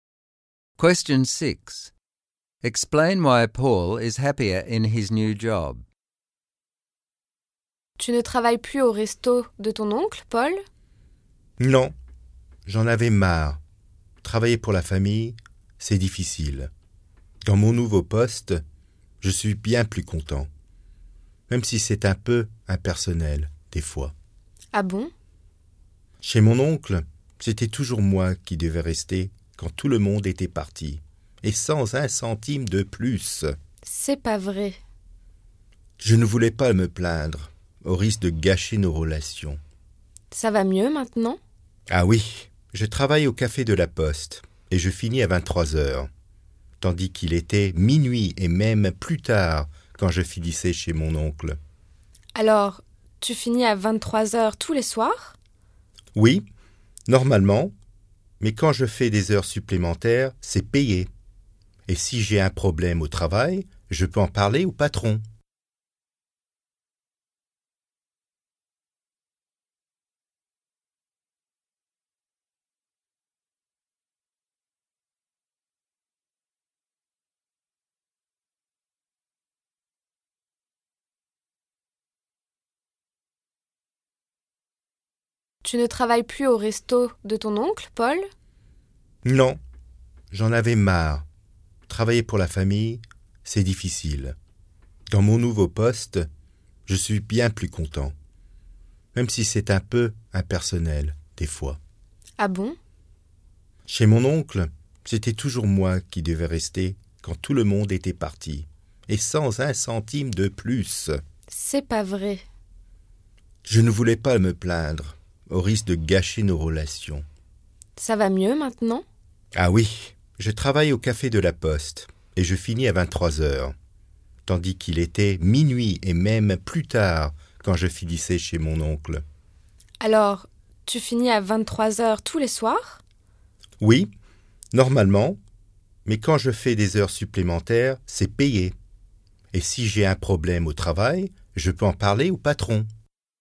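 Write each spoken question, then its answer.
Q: Explain why Paul is happier in his new job.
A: He finishes earlier (at 11 pm instead of midnight or later), he gets paid for overtime, and he can talk to the boss about problems, whereas at his uncle's he didn't want to complain in case it damaged their relationship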